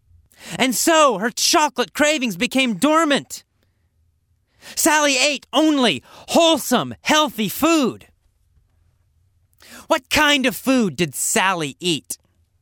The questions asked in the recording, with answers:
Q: What kind of food did Sally eat?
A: She ate only wholesome food, only healthy food, only good, healthy food.